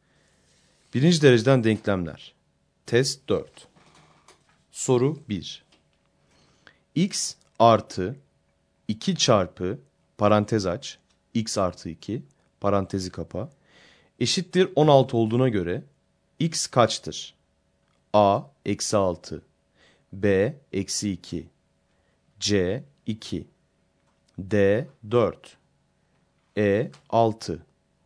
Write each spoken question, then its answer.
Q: X artı 2 çarpı parantez aç, x artı 2 parantezi kapa, eşittir 16 olduğuna göre x kaçtır?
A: Doğru yanıt D şıkkı.